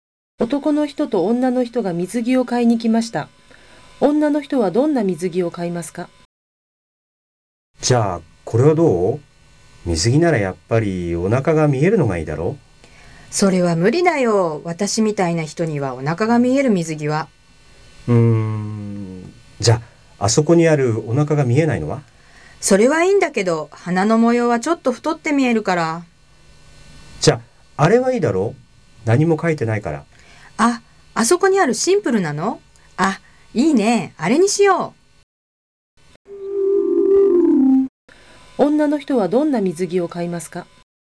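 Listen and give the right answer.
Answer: お腹が見えない、模様のないシンプルな水着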